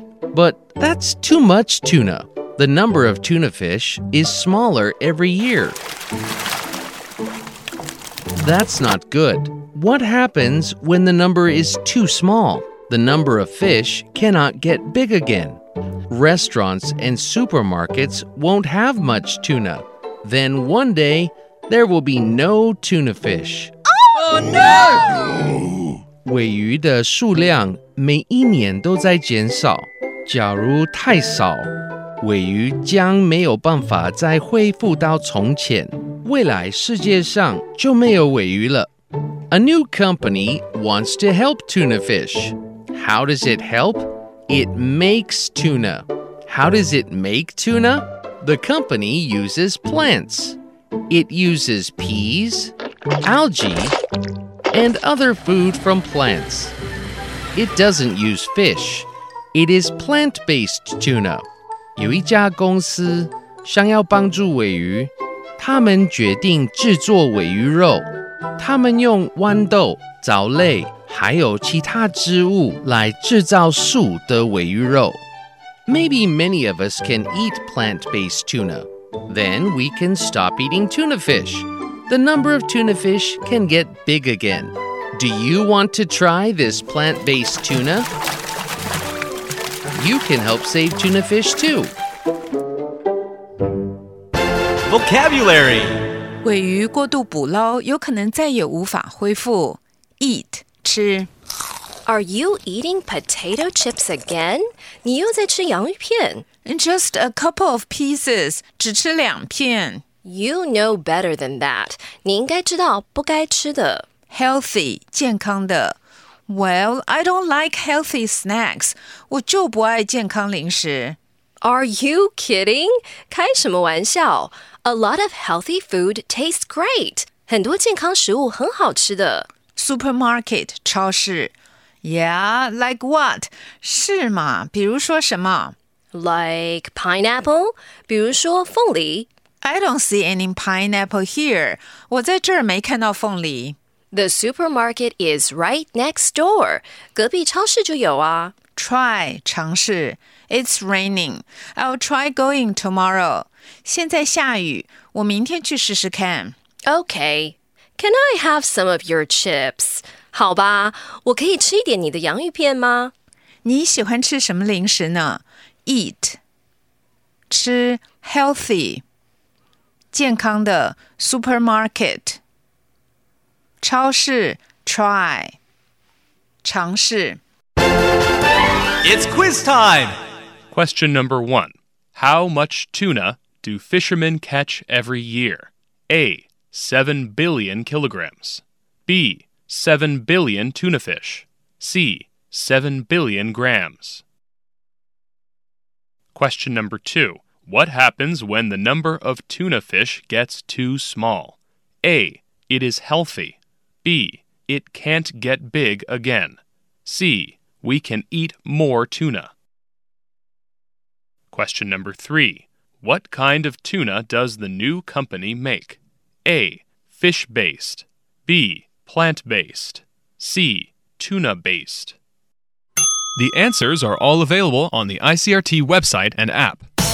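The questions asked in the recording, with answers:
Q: What happens when the number of tuna fish gets too small?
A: B: It can't get big again.

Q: What kind of tuna does the new company make?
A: B: Plant based.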